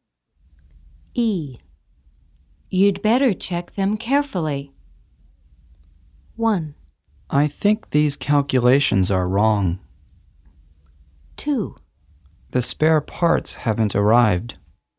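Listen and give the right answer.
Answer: 1: I think these calculations are wrong.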